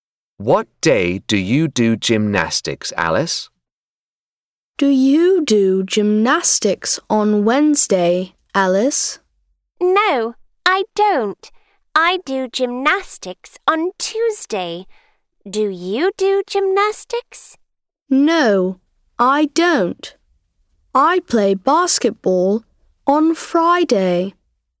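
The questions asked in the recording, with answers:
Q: What day do you do gymnastics, Alice?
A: Tuesday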